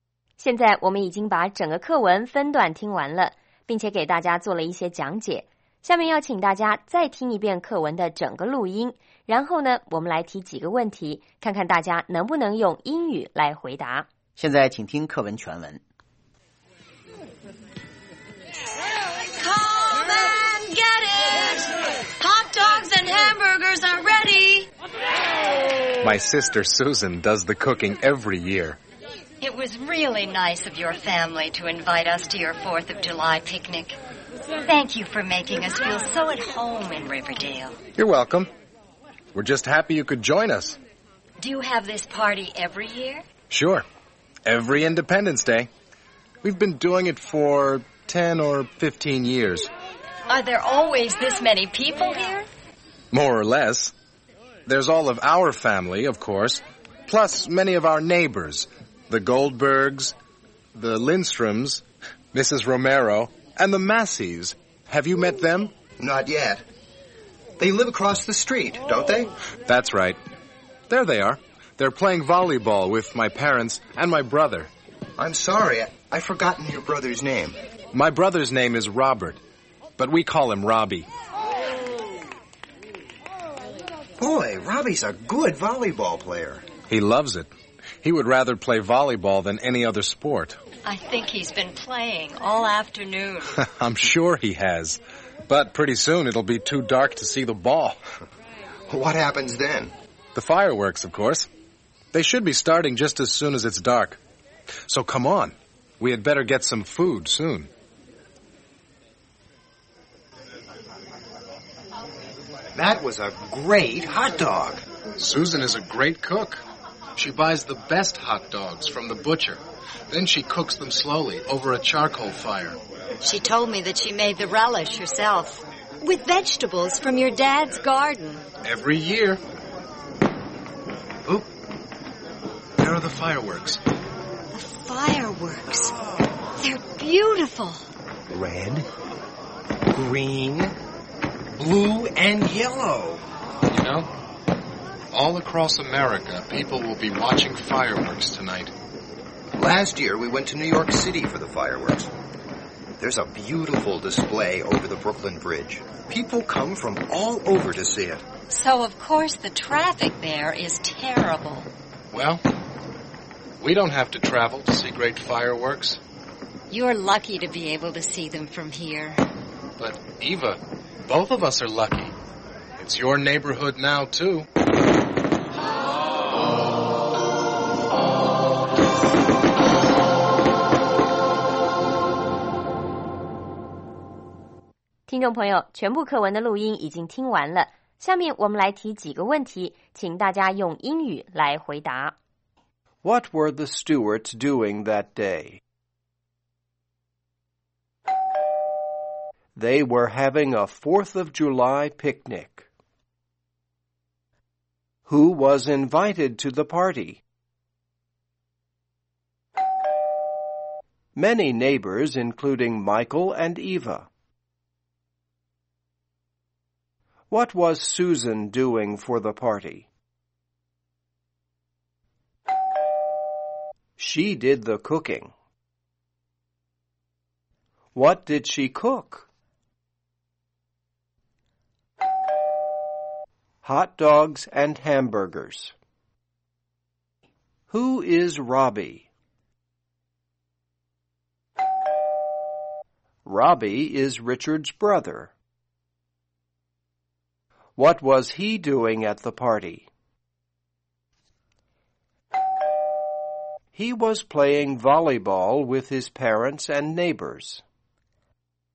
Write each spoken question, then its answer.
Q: What were the Stewarts doing that day?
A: They were having a 4th of July picnic.

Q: Who was invited to the party?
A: Many neighbors, including Michael and Eva.

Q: What was Susan doing for the party?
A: She did the cooking.

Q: What did she cook?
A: Hot dogs and hamburgers.

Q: Who is Robbie?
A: Robbie is Richard's brother.